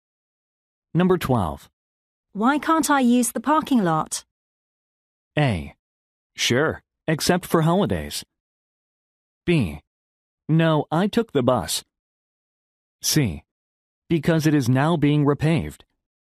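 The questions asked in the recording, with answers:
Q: Why can't I use the parking lot?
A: C: Because it is now being repaved.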